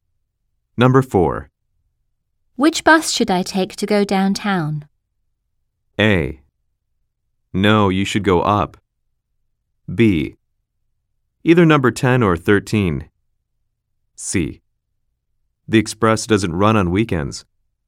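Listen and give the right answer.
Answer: B: Either number 10 or 13.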